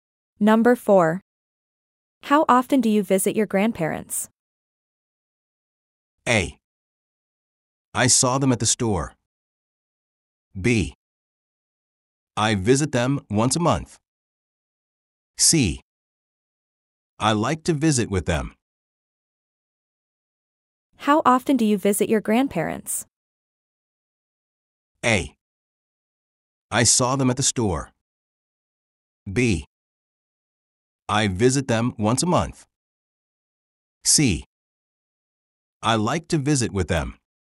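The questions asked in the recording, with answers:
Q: How often do you visit your grandparents?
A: B: I visit them once a month.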